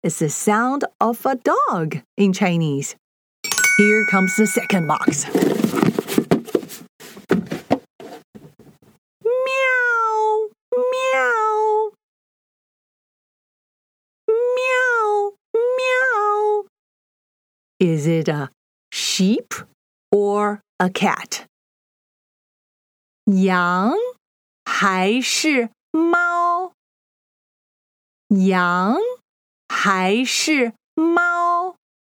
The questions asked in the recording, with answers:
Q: Is it a sheep or a cat?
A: 猫,你对了,你对了,喵。